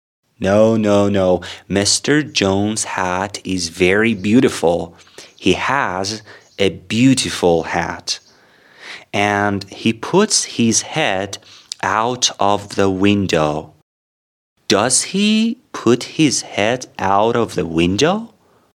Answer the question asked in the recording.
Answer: Yes, he puts his head out of the window.